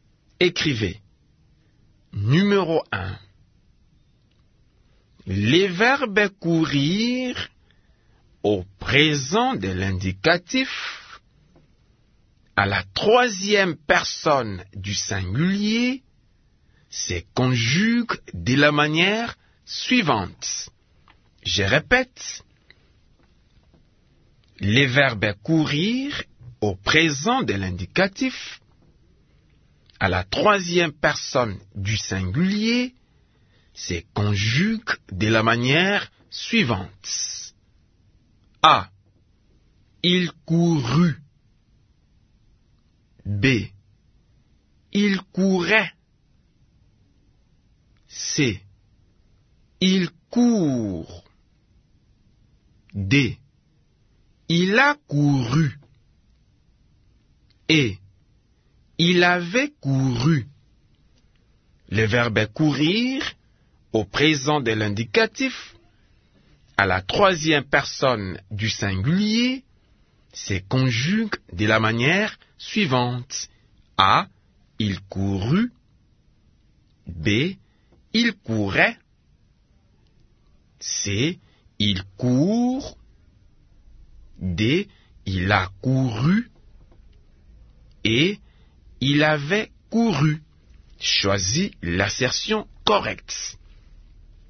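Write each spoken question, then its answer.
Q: Les verbes courir au présent de l'indicatif, à la troisième personne du singulier, se conjuguent de la manière suivante.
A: C: Il court.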